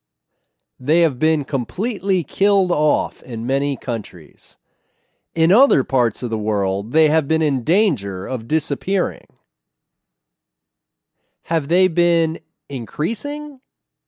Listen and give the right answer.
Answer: No, they haven't been increasing.